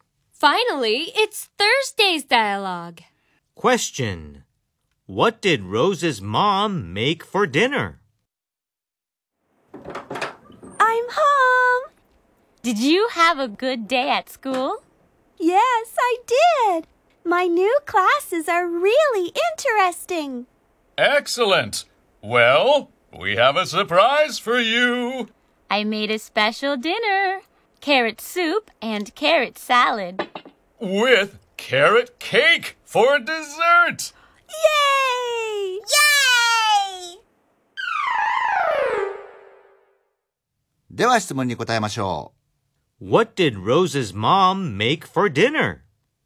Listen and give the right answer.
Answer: She made carrot soup and carrot salad.